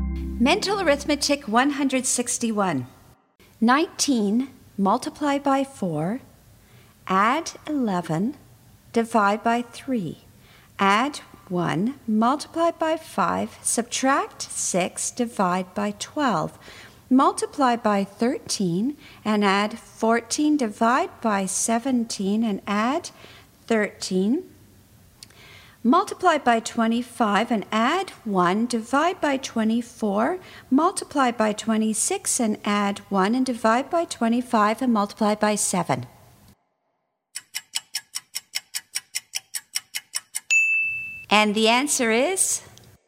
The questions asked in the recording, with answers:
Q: 19 multiply by 4, add 11, divide by 3, add 1, multiply by 5, subtract 6, divide by 12, multiply by 13, and add 14, divide by 17, and add 13. Multiply by 25 and add 1, divide by 24, multiply by 26 and add 1, and divide by 25 and multiply by 7.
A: 175.